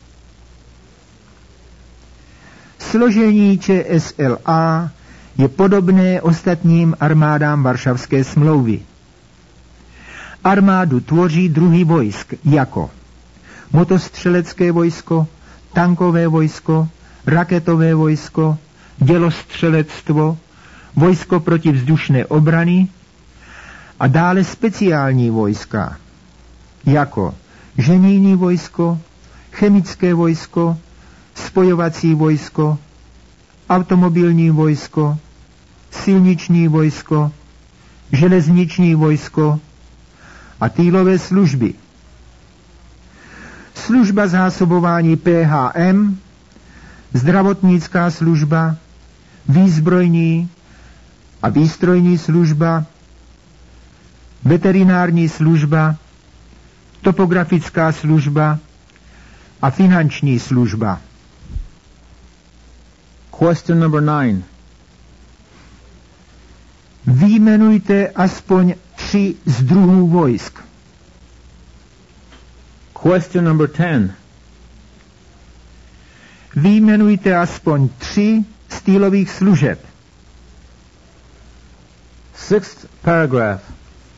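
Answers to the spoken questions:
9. Např. motostřelecké vojsko, tankové vojsko, raketové vojsko a dělostřelectvo
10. Např. zdravotnická služba, výzbrojní služba, finanční služba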